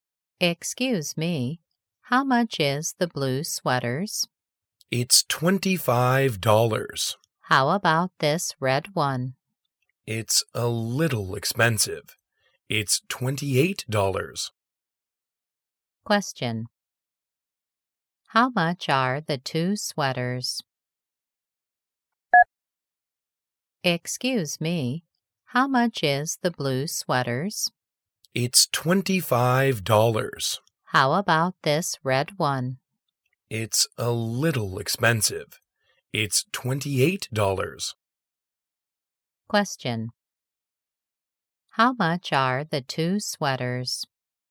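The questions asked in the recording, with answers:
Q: How much are the two sweaters?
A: $25 and $28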